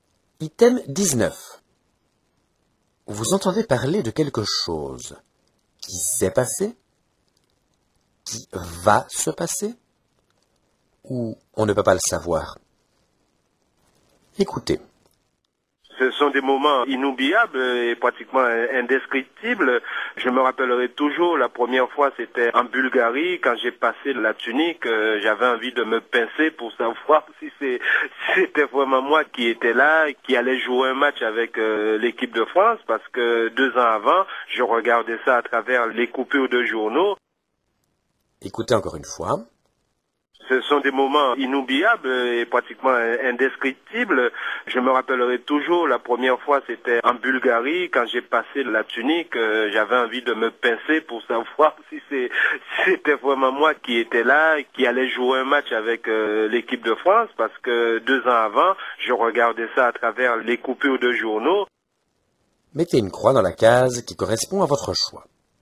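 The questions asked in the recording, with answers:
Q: Vous entendez parler de quelque chose qui s'est passé, qui va se passer, ou on ne peut pas le savoir.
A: qui s'est passé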